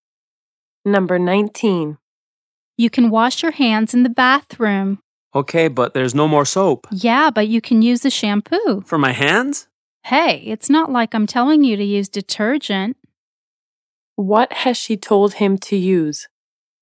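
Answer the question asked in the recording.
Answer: Shampoo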